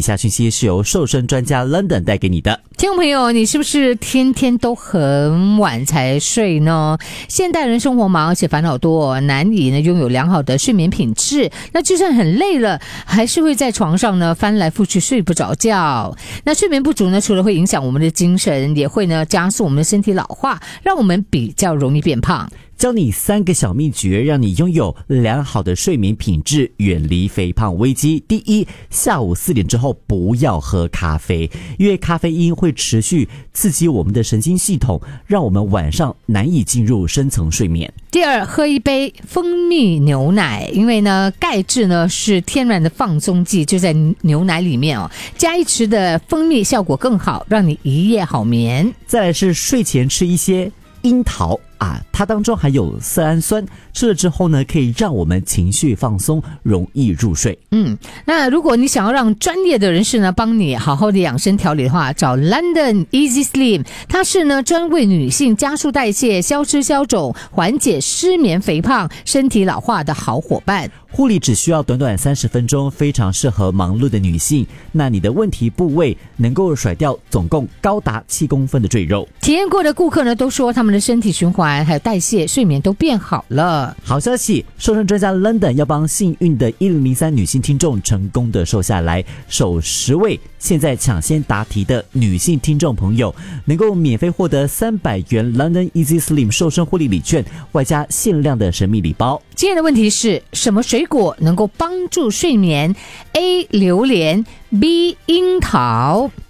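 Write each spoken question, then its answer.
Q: 什么水果能够帮助睡眠? A 榴莲, B 樱桃。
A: B: 樱桃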